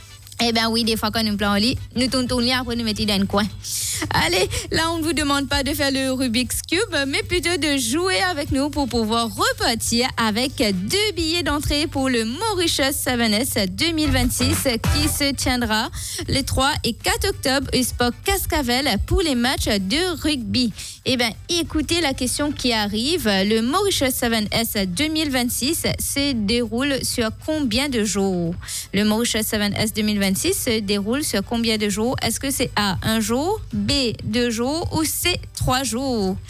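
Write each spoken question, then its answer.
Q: Le Mauritius 7S 2026 se déroule sur combien de jours ?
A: B: deux jours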